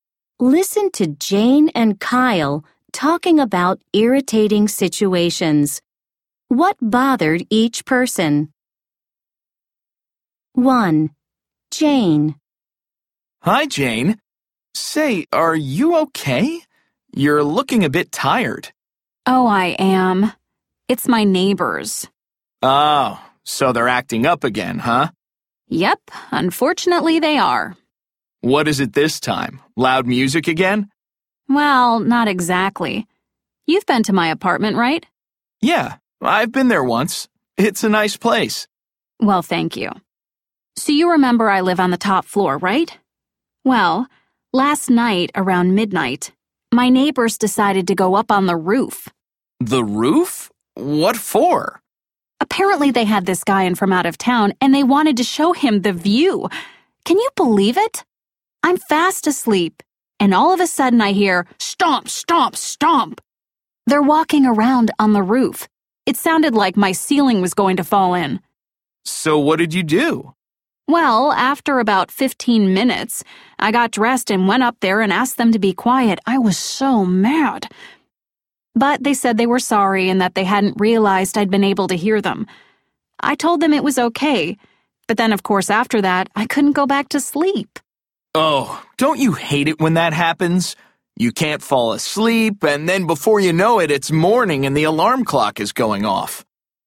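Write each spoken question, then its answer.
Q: What bothered each person? 1. Jane.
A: Her neighbors walked around on the roof at midnight and woke her up.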